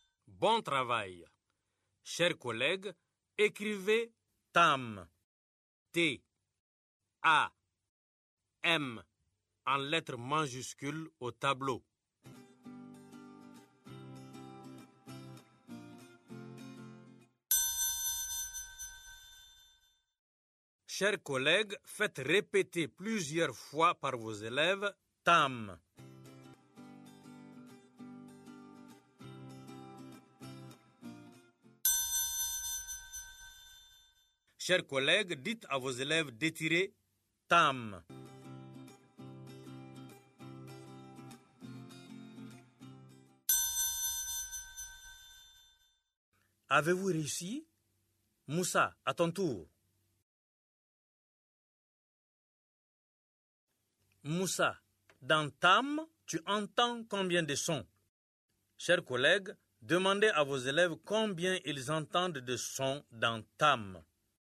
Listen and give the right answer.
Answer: Monsieur, j'entends 3 sons.